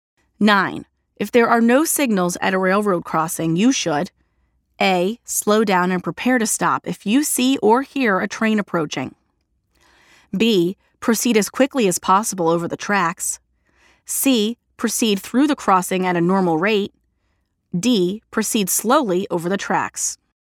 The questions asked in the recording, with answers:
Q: If there are no signals at a railroad crossing, you should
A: The answer is letter A.